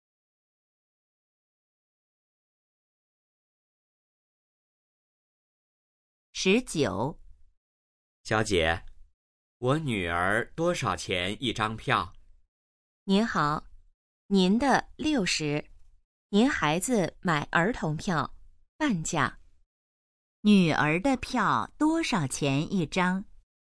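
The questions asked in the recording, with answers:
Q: 女儿的票多少钱一张?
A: 30元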